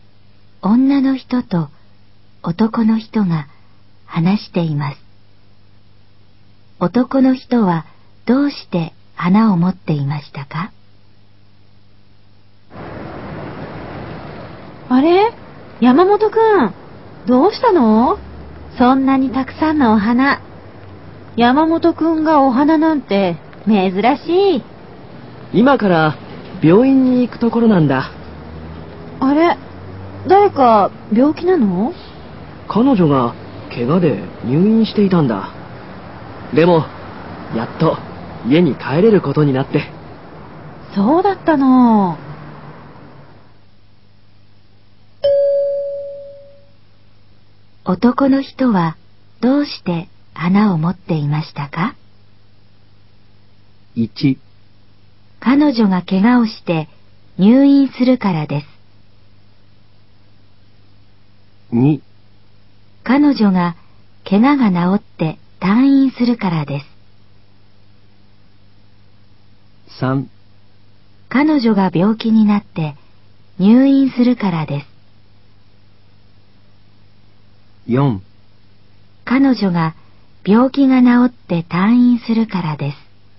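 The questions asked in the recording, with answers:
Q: 男の人はどうして花を持っていましたか?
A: 2: 彼女が怪我が治って退院するからです。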